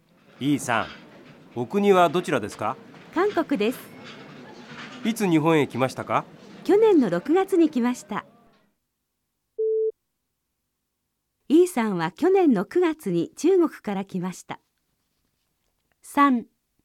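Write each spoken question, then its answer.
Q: イーさんは去年の9月に中国から来ました。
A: 正しくない(×)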